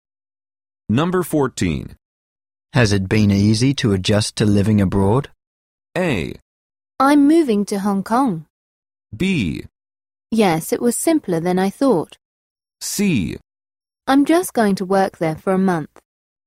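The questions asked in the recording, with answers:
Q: Has it been easy to adjust to living abroad?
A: B: Yes, it was simpler than I thought.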